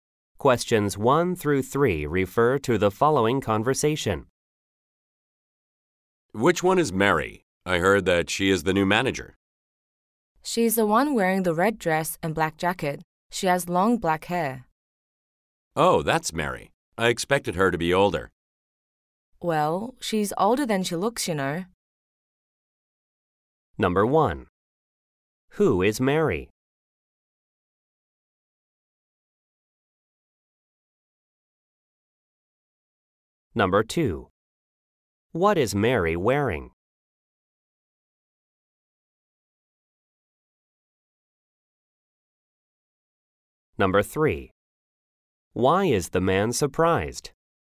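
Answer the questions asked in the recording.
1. The new manager
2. A red dress and black jacket
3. Mary looks younger than he expected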